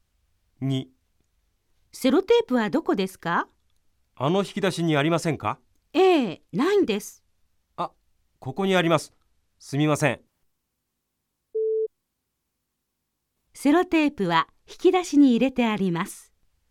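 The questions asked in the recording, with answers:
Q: セロテープは引き出しに入れてあります。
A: ×(正しくない)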